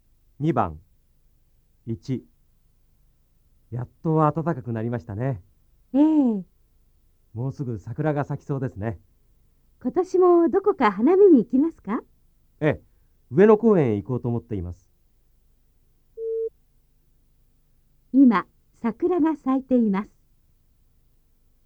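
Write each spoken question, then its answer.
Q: 今、桜が咲いています。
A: いいえ、まだ咲いていません(もうすぐ咲きそうです)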